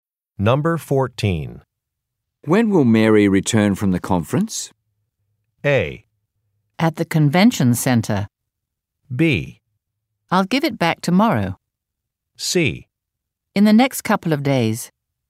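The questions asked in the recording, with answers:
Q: When will Mary return from the conference?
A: C: In the next couple of days.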